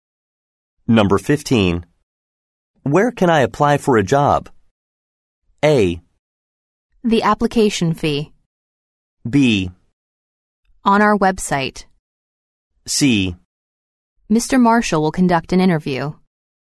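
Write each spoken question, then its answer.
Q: Where can I apply for a job?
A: B: On our website.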